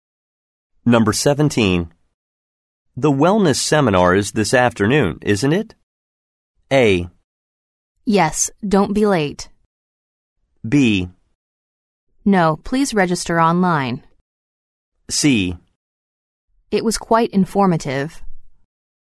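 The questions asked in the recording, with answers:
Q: The wellness seminar is this afternoon, isn't it?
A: A: Yes, don't be late.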